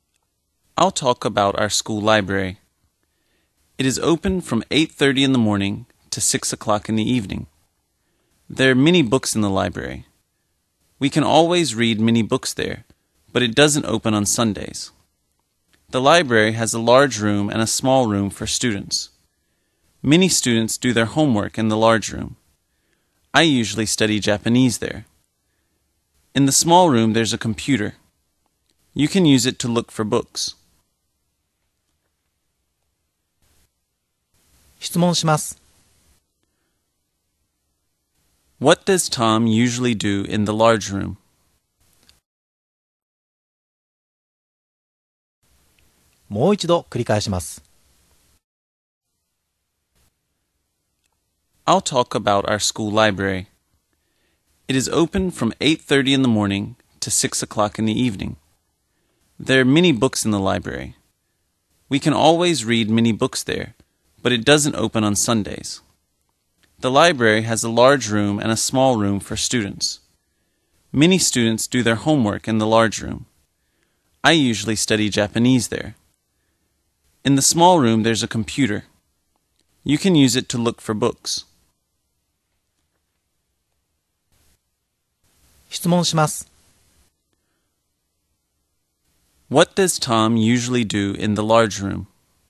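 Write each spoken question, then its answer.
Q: What does Tom usually do in the large room?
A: He studies Japanese.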